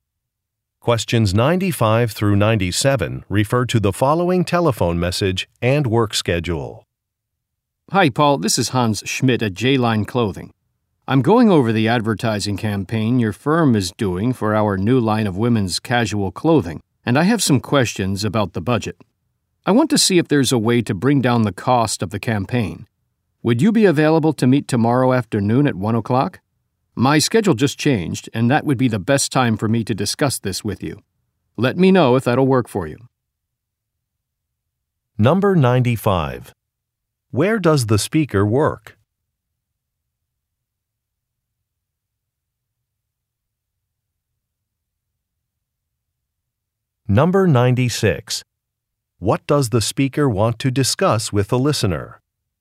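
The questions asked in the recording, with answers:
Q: Where does the speaker work?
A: At a clothing company (J-Line Clothing)

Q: What does the speaker want to discuss with the listener?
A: The advertising campaign budget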